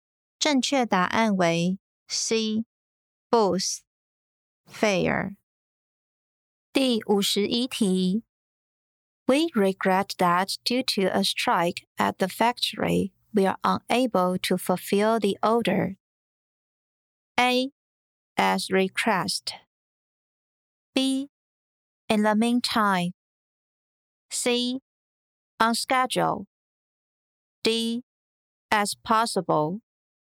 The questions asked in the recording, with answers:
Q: We regret that due to a strike at the factory, we are unable to fulfill the order.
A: 正确答案为 C. On schedule.